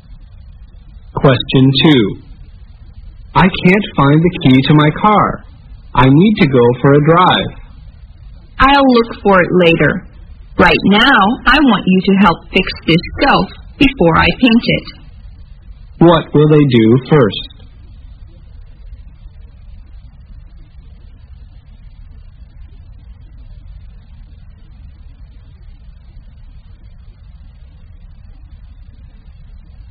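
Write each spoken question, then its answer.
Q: What will they do first?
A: Fix the shelf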